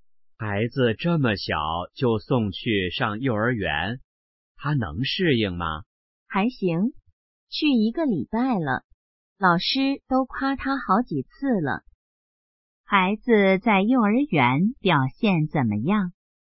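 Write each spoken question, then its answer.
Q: 孩子在幼儿园表现怎么样?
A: 很好,老师夸了他好几次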